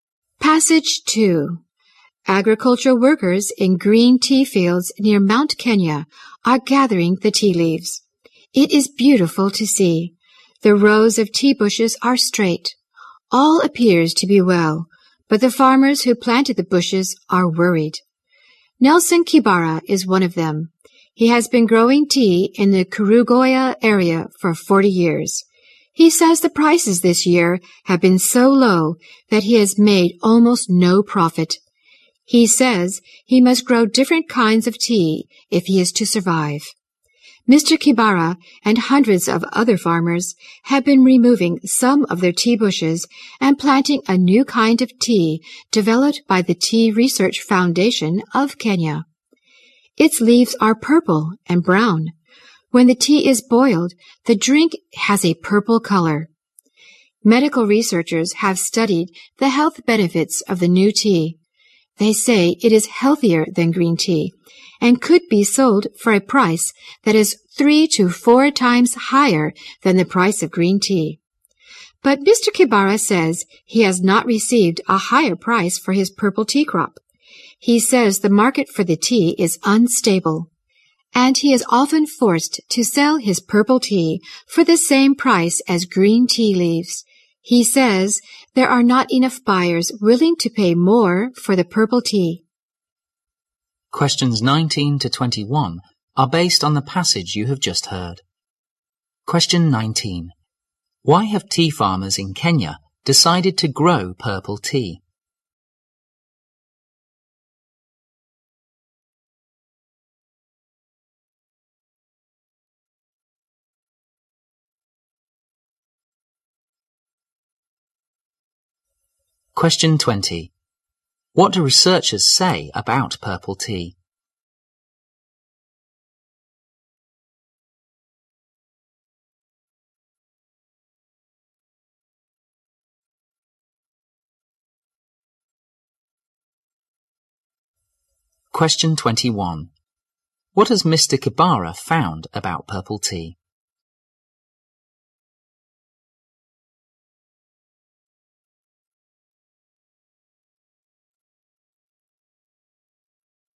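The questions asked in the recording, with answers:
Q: Why have tea farmers in Kenya decided to grow purple tea?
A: Green tea prices were too low to make a profit

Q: What do researchers say about purple tea?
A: It is healthier than green tea and could sell for 3 to 4 times the price

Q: What has Mr. Kibara found about purple tea?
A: Its market is unstable; he often sells it at green tea prices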